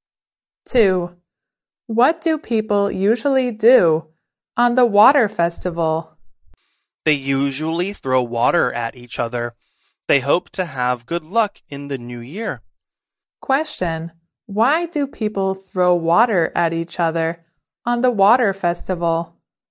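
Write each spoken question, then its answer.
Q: Question, why do people throw water at each other on the water festival?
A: They hope to have good luck in the new year.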